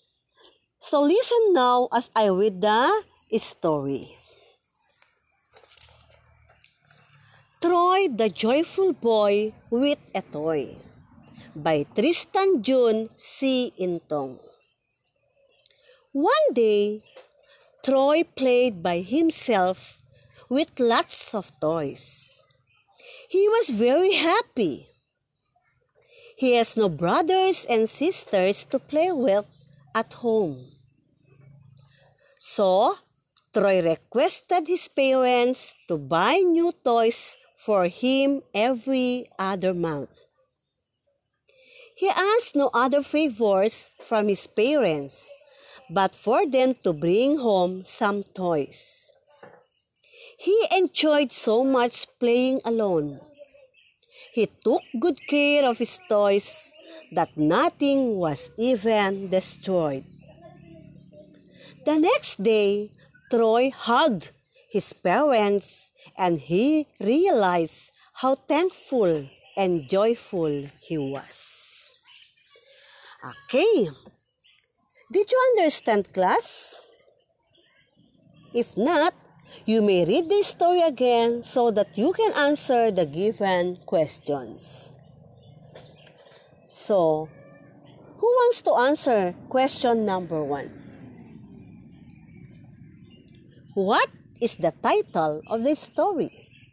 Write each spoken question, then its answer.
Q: What is the title of this story?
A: Yes, the title of this story is Troy the Joyful Boy with a Toy.